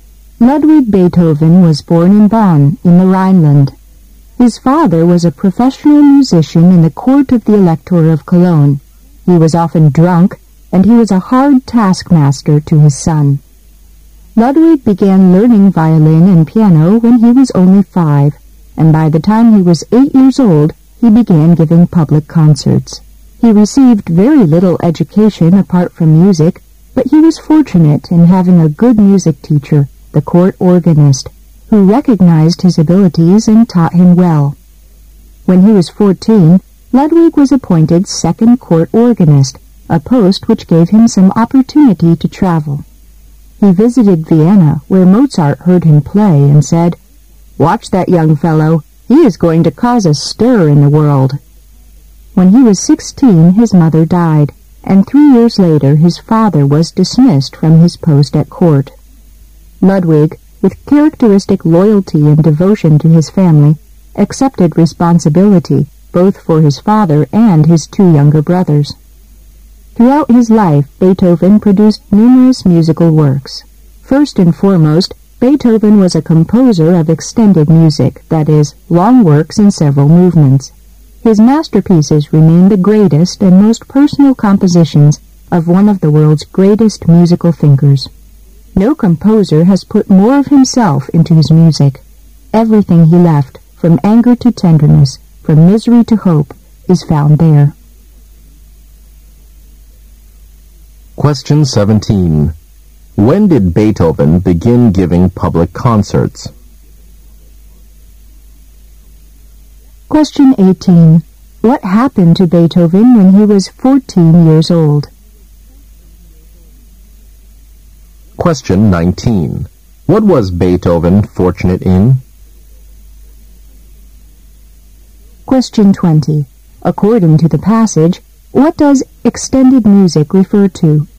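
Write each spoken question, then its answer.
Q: When did Beethoven begin giving public concerts?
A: When he was 8 years old

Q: What happened to Beethoven when he was 14 years old?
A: He was appointed second court organist

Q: What was Beethoven fortunate in?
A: Having a good music teacher, the court organist

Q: According to the passage, what does extended music refer to?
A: Long works in several movements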